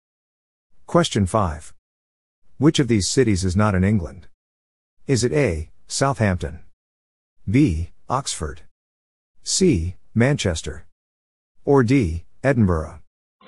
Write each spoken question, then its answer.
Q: Which of these cities is not in England?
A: The answer is D, Edinburgh.